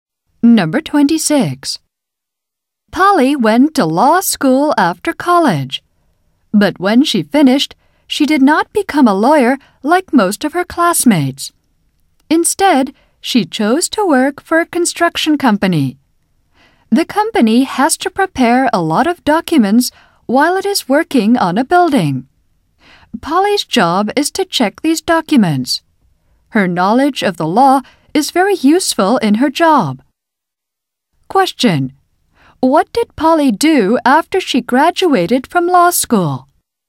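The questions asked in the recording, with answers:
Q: What did Polly do after she graduated from law school?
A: She started working for a construction company.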